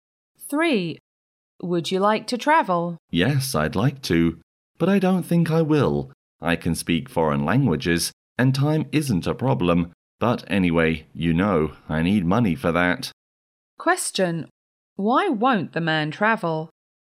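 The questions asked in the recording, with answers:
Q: Why won't the man travel?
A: He doesn't have enough money.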